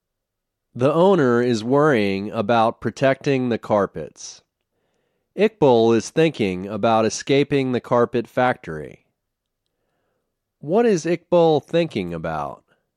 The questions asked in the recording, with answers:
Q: What is Iqbal thinking about?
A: He is thinking about escaping the carpet factory.